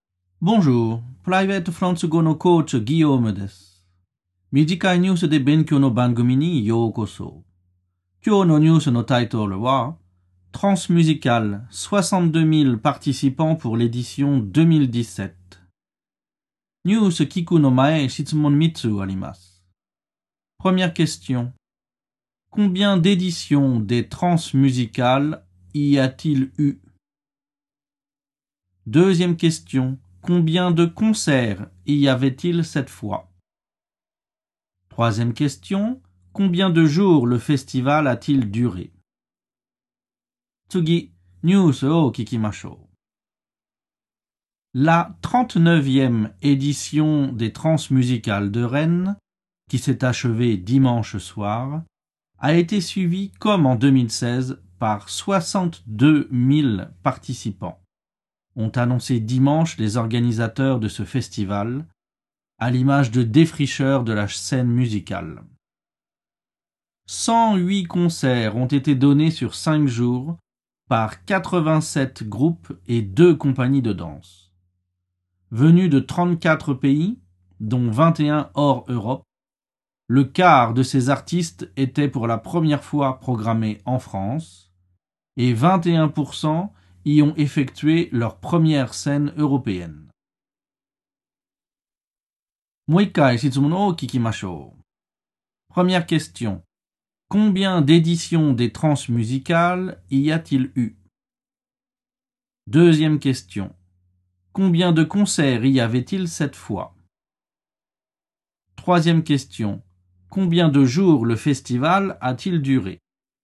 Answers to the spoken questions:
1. Réponse. Il y a eu 39 éditions de ce festival.
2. Réponse, il y avait 108 concerts cette fois.
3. Réponse, le festival a duré 5 jours.